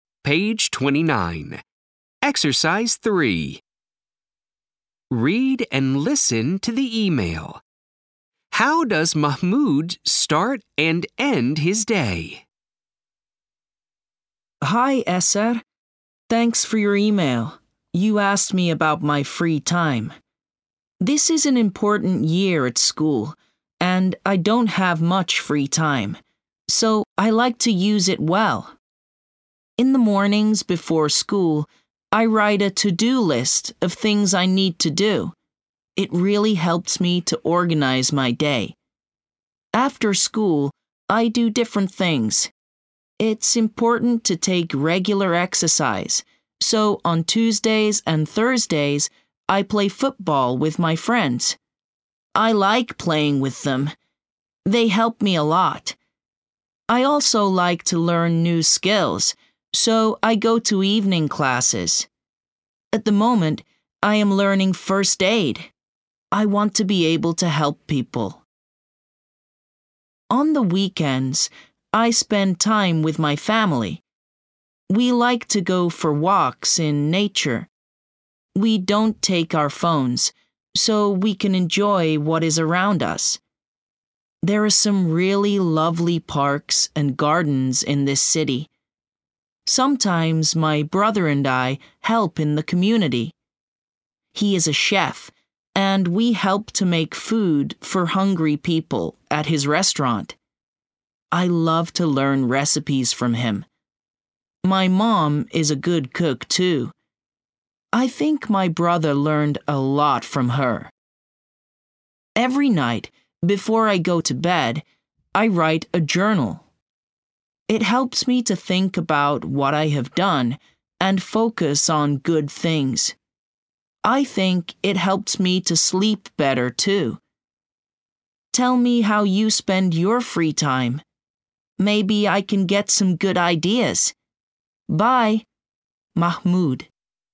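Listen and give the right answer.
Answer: He writes a to-do list in the morning and writes a journal every night before bed.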